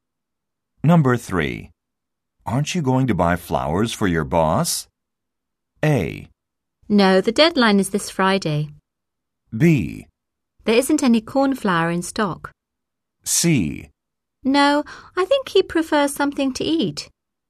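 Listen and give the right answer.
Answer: C: No, I think he prefers something to eat.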